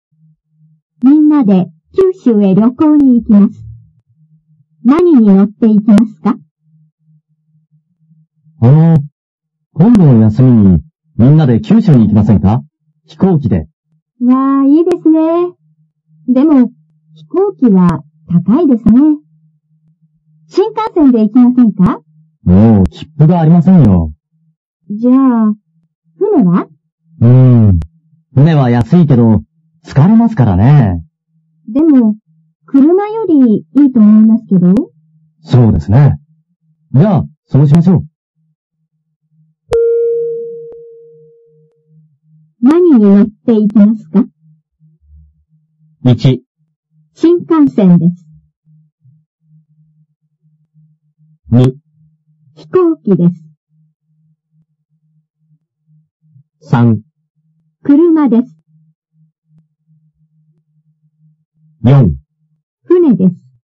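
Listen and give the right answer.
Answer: 4: 船です。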